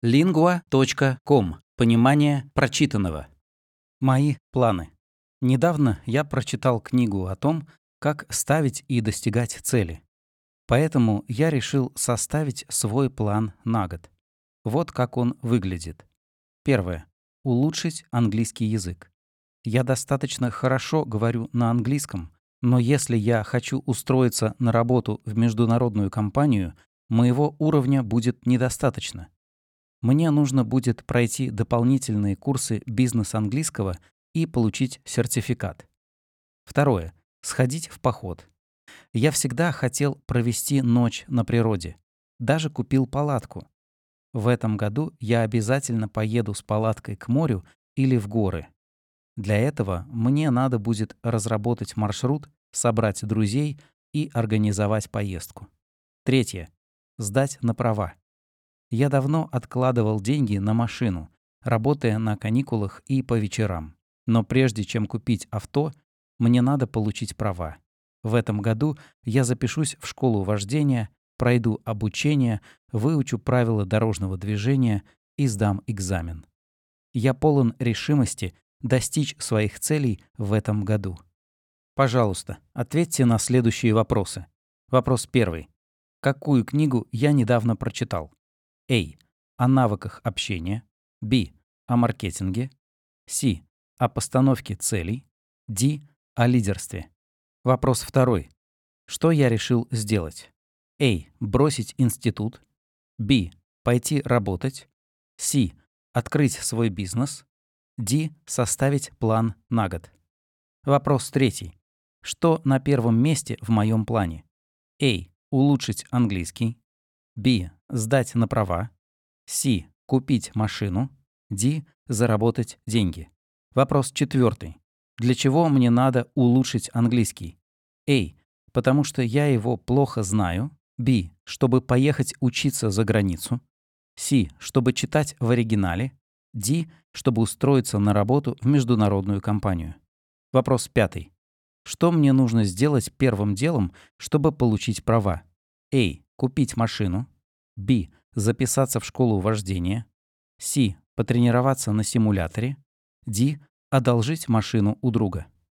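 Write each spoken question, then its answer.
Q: Какую книгу я недавно прочитал?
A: C: О постановке целей

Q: Что я решил сделать?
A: D: Составить план на год

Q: Что на первом месте в моем плане?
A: A: Улучшить английский

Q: Для чего мне надо улучшить английский?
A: D: Чтобы устроиться на работу в международную компанию

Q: Что мне нужно сделать первым делом, чтобы получить права?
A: B: Записаться в школу вождения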